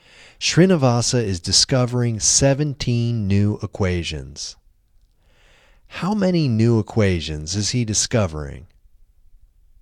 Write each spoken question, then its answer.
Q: How many new equations is he discovering?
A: He is discovering 17 new equations.